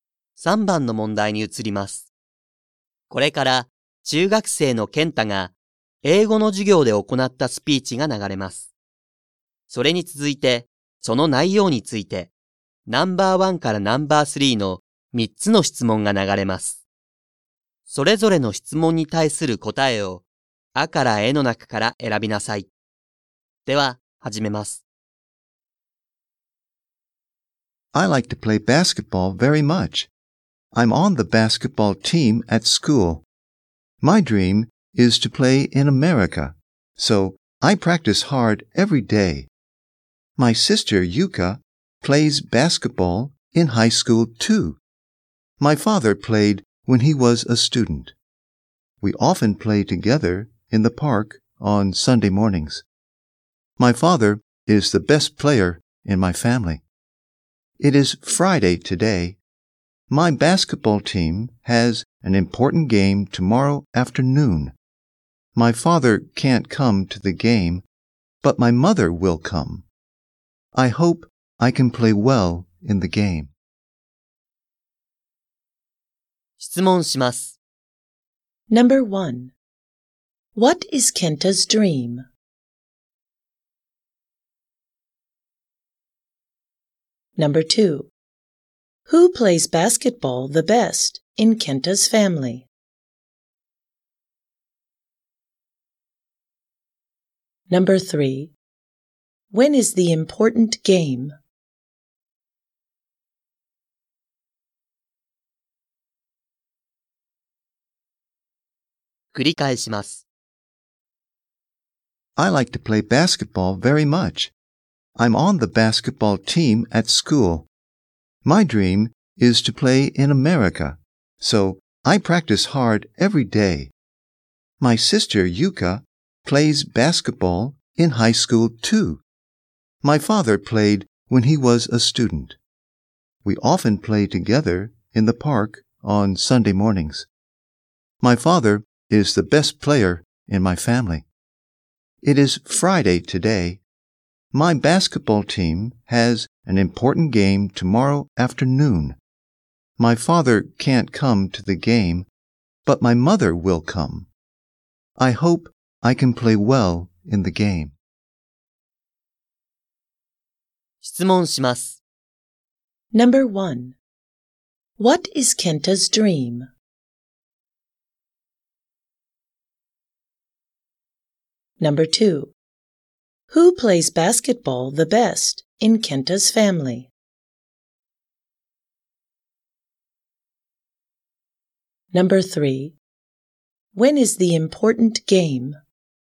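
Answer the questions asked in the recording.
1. To play basketball in America
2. His father
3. Saturday afternoon (tomorrow afternoon)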